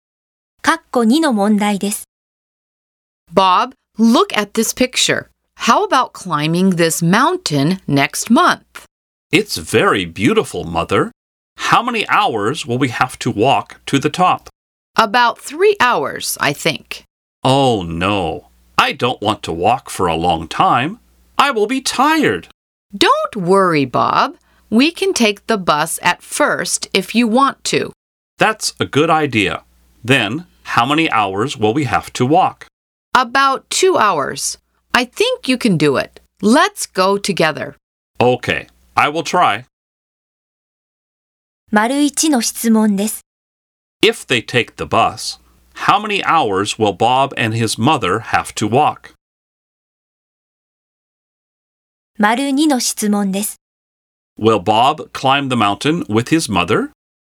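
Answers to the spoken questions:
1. About 2 hours
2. Yes, he will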